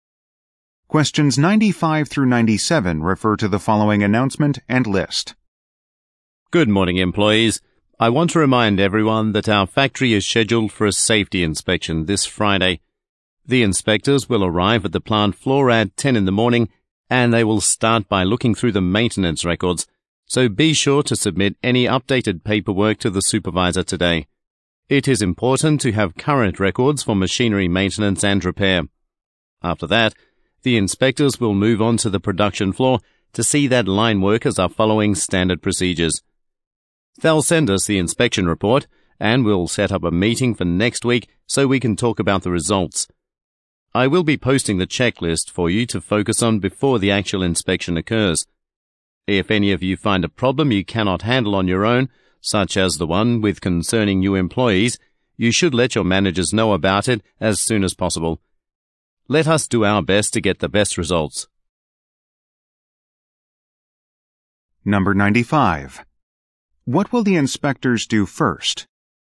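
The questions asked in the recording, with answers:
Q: What will the inspectors do first?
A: Look through the maintenance records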